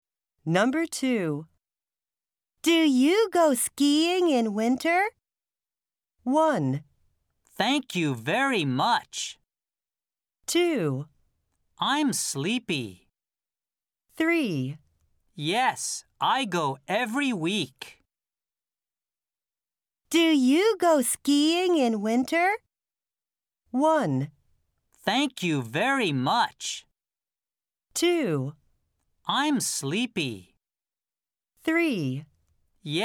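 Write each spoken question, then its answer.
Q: Do you go skiing in winter?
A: 3: Yes, I go every week.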